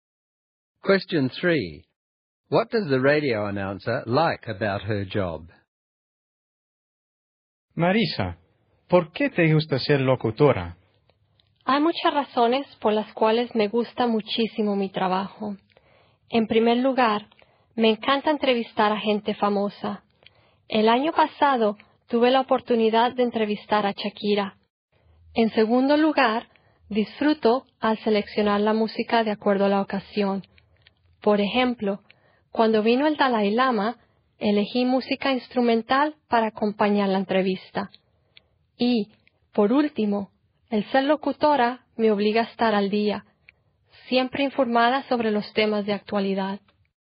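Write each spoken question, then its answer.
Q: What does the radio announcer like about her job?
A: She likes interviewing famous people, choosing music to suit the occasion, and having to stay up to date on current affairs.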